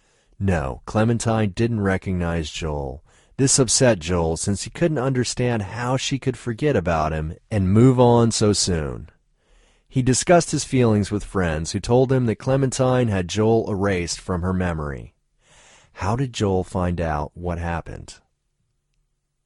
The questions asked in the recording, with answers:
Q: How did Joel find out what happened?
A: Joel's friend told him what happened.